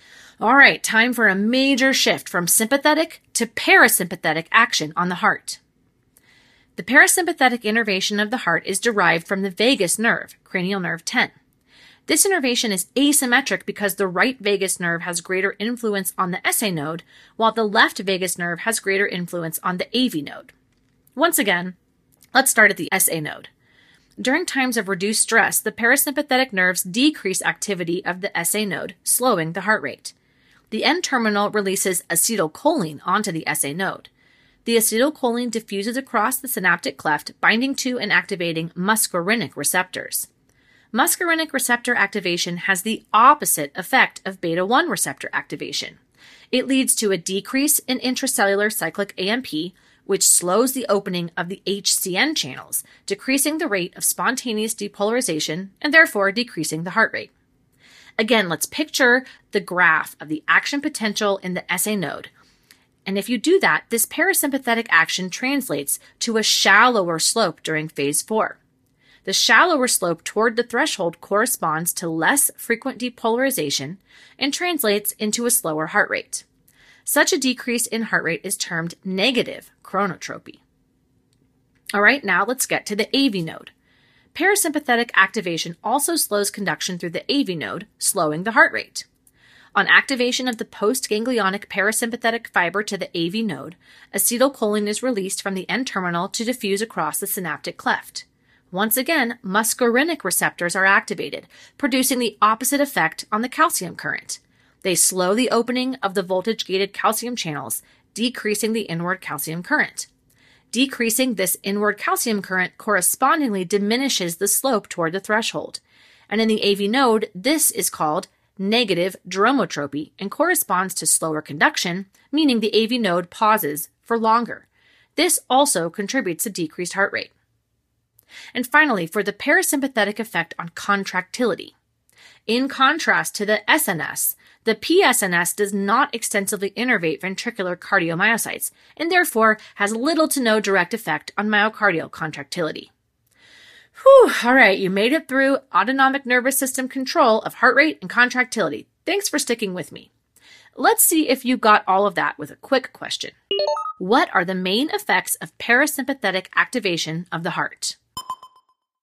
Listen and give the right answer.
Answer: The main effects of parasympathetic activation of the heart are negative chronotropy at the SA node and negative dromotropy at the AV node.